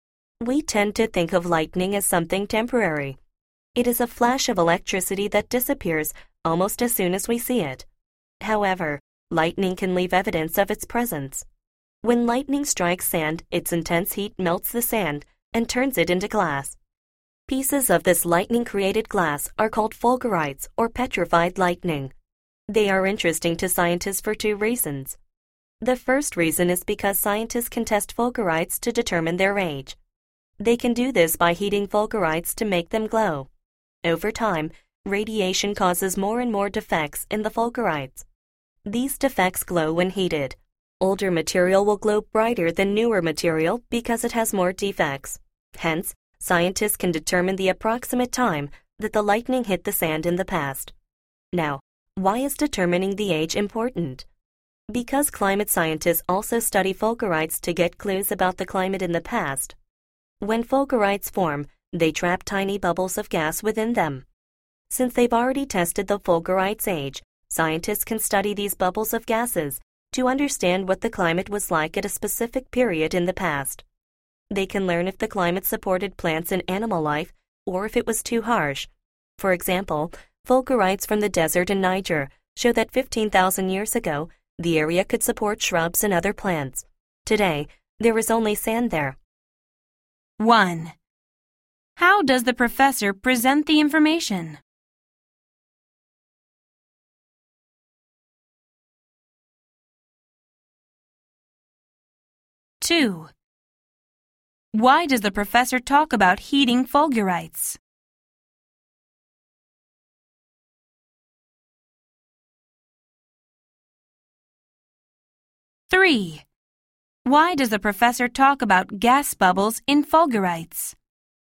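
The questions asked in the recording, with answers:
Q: Why does the professor talk about heating fulgurites?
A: To explain how scientists find out how old fulgurites are

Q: Why does the professor talk about gas bubbles in fulgurites?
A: To explain how scientists learn what the climate was like in the past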